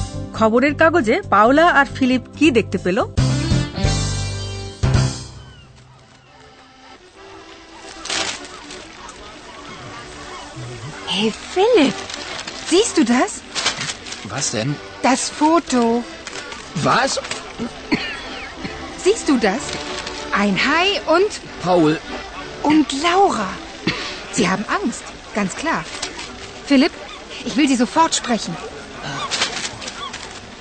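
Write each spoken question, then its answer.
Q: খবরের কাগজে পাওলা আর Philip কি দেখতে পেল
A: একটা ছবি: একটা হাঙর আর Paul ও লাউরা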